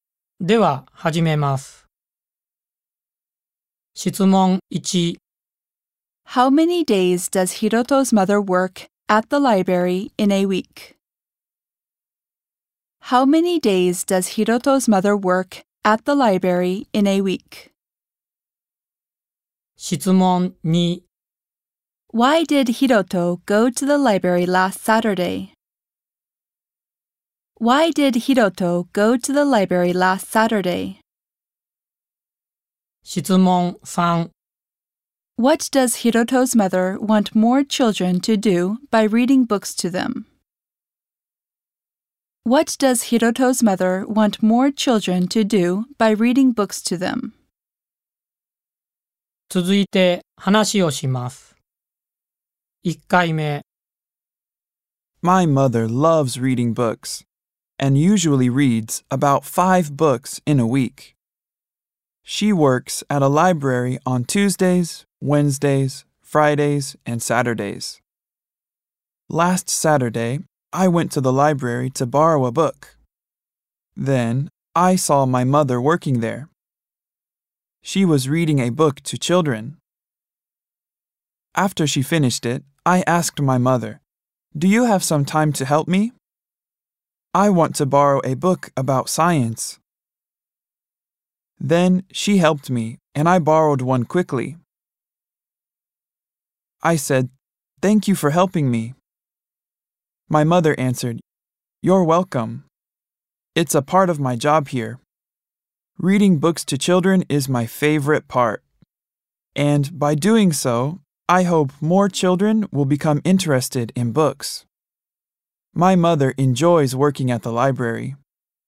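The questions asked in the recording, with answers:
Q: How many days does Hiroto's mother work at the library in a week?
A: Four days

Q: Why did Hiroto go to the library last Saturday?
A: To borrow a book (about science)

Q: What does Hiroto's mother want more children to do by reading books to them?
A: Become interested in books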